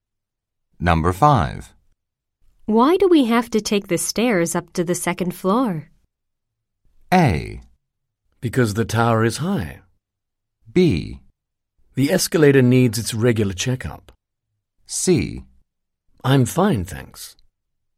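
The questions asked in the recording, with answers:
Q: Why do we have to take the stairs up to the second floor?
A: B: The escalator needs its regular checkup.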